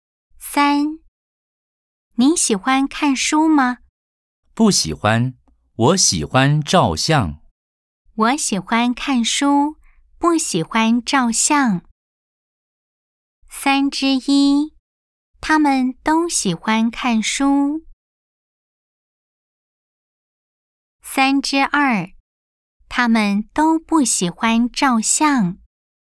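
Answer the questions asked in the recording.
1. 错 (X)
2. 错 (X)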